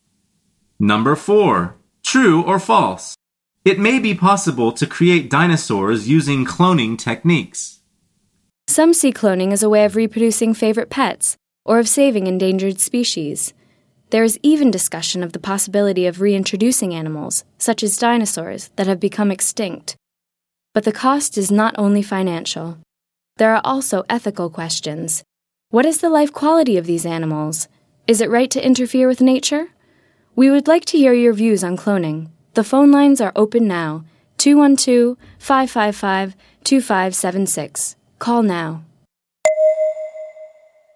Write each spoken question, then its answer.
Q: True or false? It may be possible to create dinosaurs using cloning techniques.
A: The answer is true.